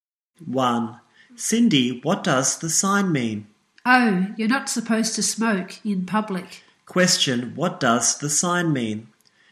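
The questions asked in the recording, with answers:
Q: Question, what does the sign mean?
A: No smoking in public.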